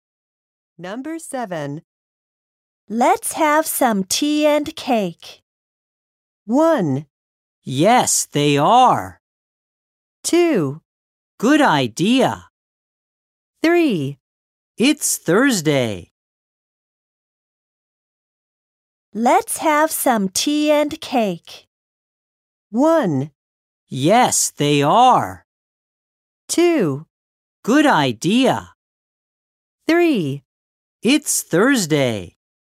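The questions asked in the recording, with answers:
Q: Let's have some tea and cake.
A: 2: Good idea.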